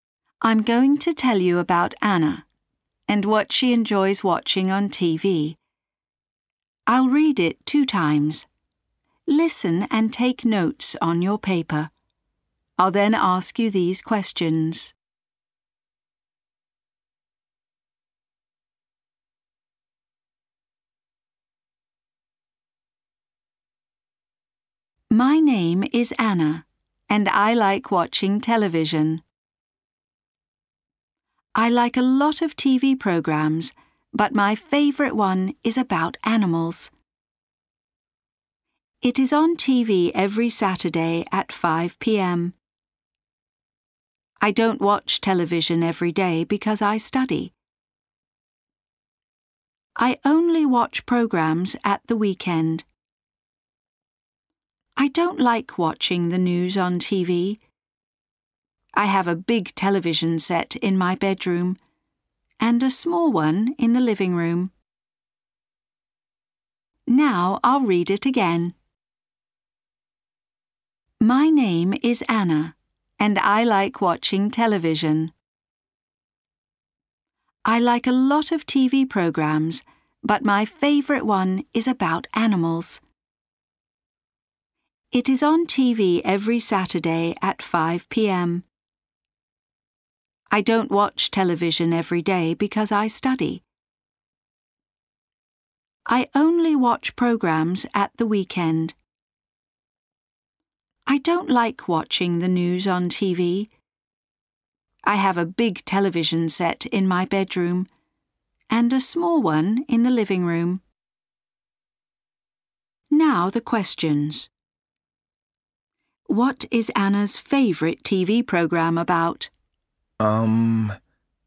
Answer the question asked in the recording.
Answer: Animals?